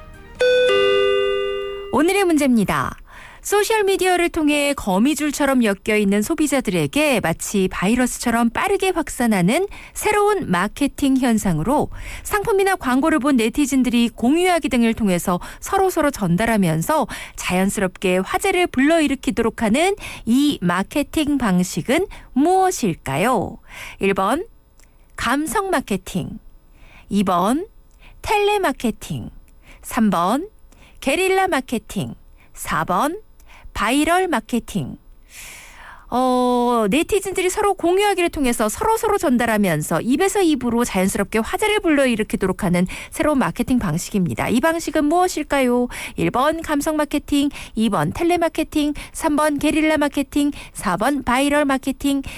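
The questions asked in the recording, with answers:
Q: 소셜미디어를 통해 거미줄처럼 엮여있는 소비자들에게 마치 바이러스처럼 빠르게 확산하는 새로운 마케팅 현상으로 상품이나 광고를 본 네티즌들이 공유하기 등을 통해서 서로서로 전달하면서 자연스럽게 화제를 불러일으키도록 하는 이 마케팅 방식은 무엇일까요?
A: 4: 바이럴 마케팅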